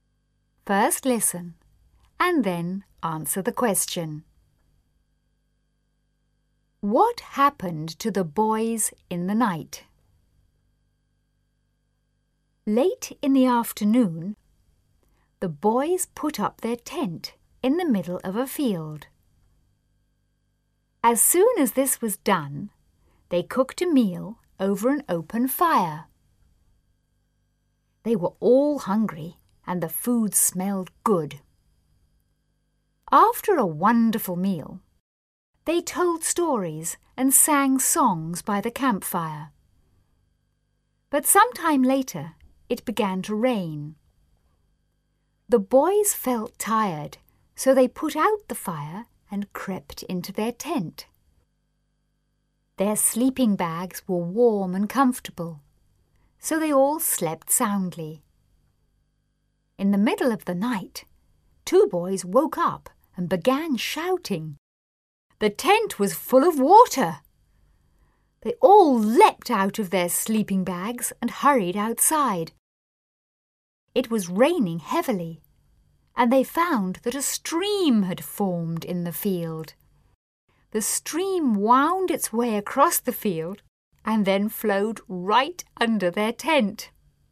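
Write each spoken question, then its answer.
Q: What happened to the boys in the night?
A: A stream formed in the field and flowed under their tent, filling it with water.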